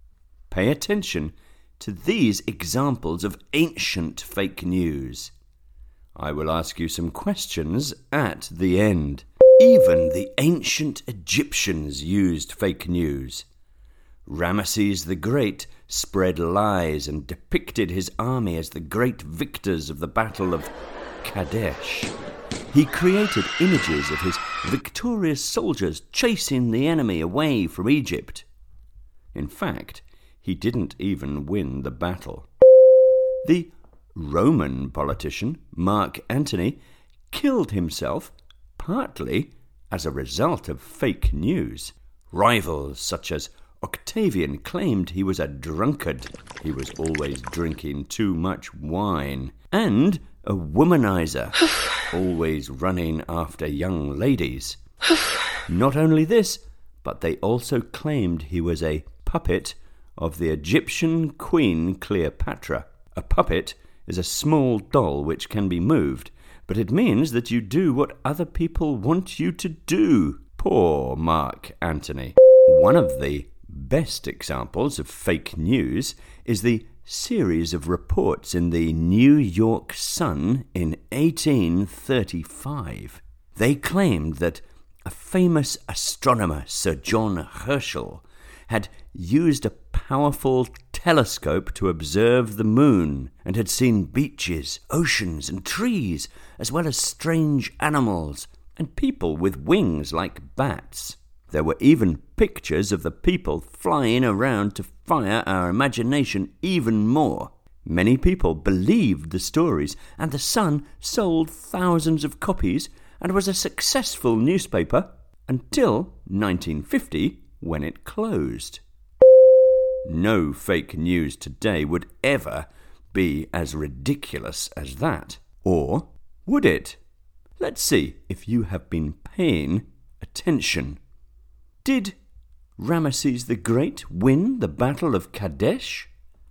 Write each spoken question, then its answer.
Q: Did Ramesses the Great win the Battle of Kadesh?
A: No. He created fake news to convince everyone that he had.